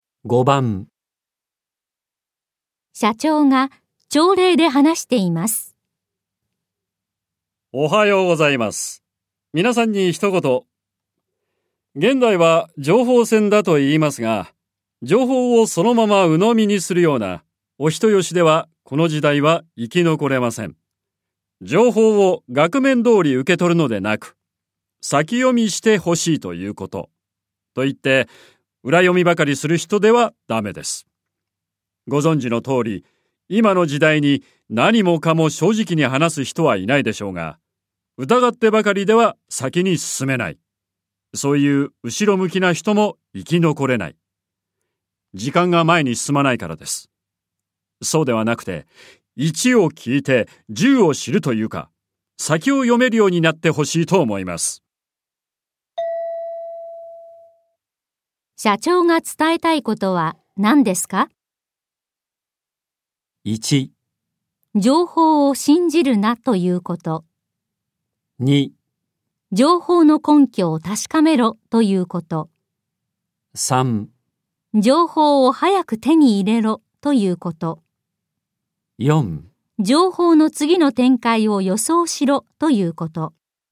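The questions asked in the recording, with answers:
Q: 社長が伝えたいことは何ですか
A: 4: 情報の次の展開を予想しろということ。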